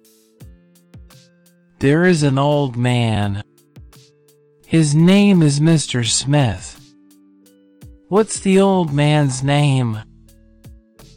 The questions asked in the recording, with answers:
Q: What's the old man's name?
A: Mr. Smith.